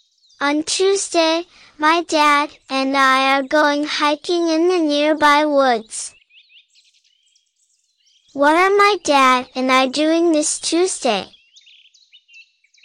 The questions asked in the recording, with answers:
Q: What are my dad and I doing this Tuesday?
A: We're going hiking.